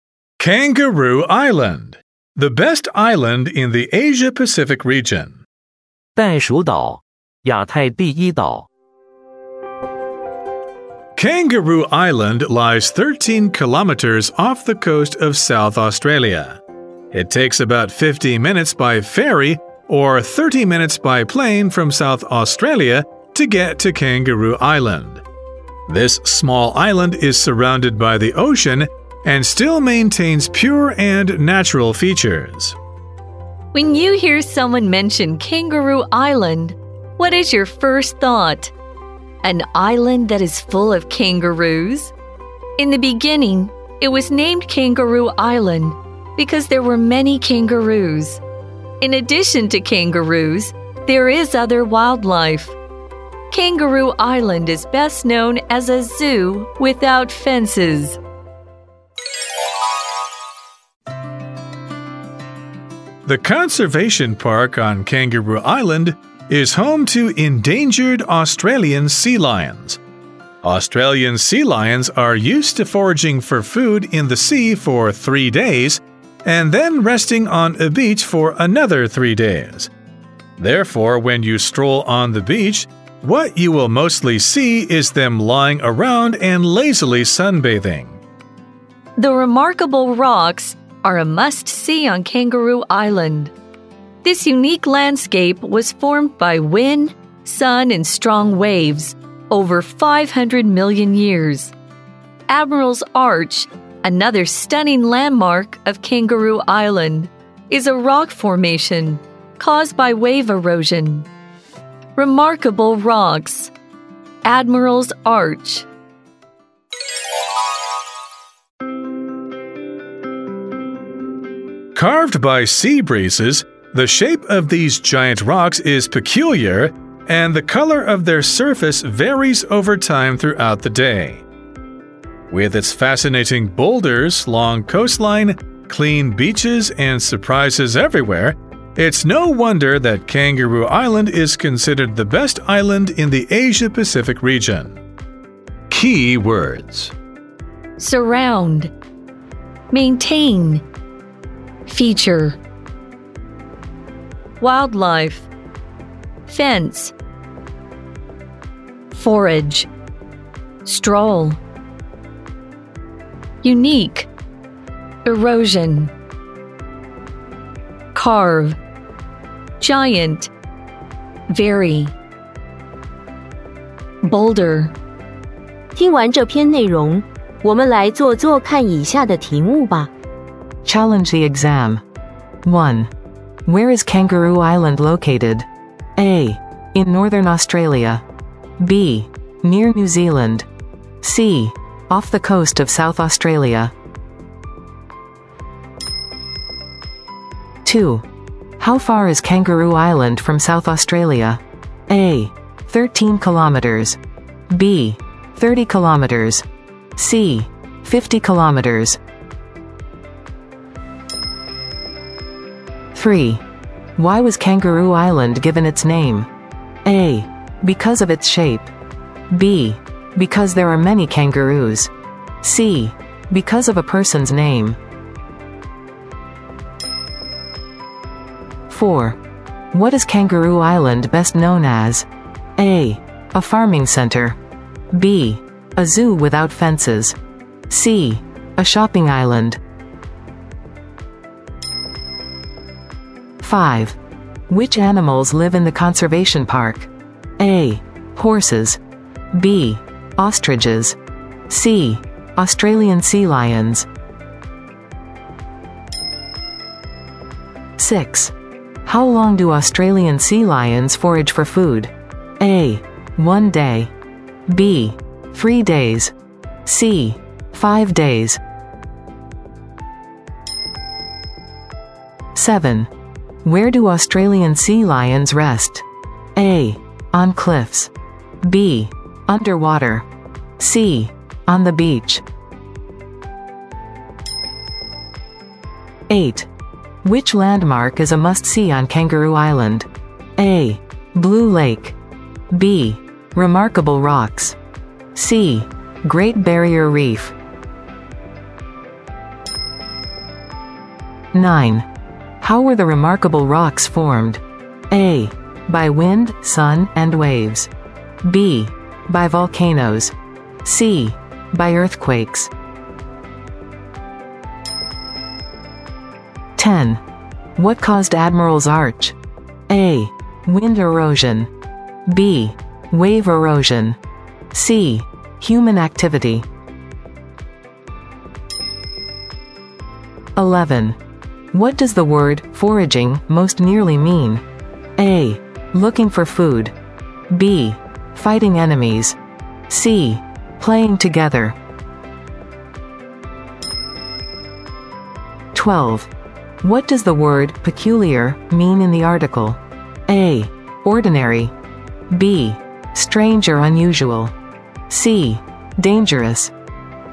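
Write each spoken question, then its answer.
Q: Where is Kangaroo Island located?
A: C: Off the coast of South Australia.

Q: How far is Kangaroo Island from South Australia?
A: A: 13 kilometers.

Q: Why was Kangaroo Island given its name?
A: B: Because there are many kangaroos.

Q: What is Kangaroo Island best known as?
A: B: A zoo without fences.

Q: Which animals live in the conservation park?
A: C: Australian sea lions.

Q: How long do Australian sea lions forage for food?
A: B: 3 days.

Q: Where do Australian sea lions rest?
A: C: On the beach.

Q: Which landmark is a must-see on Kangaroo Island?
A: B: Remarkable Rocks.

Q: How were the remarkable rocks formed?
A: A: By wind, sun, and waves.

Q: What caused Admiral's Arch?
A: B: Wave erosion.

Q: What does the word foraging most nearly mean?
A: A: Looking for food.

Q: What does the word peculiar mean in the article?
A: B: Strange or unusual.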